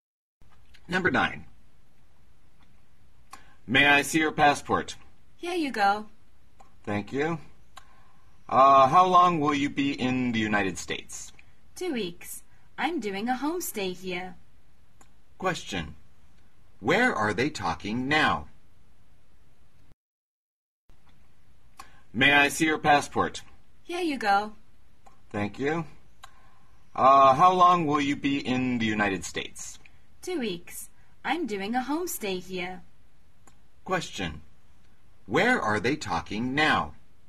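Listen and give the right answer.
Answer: At an airport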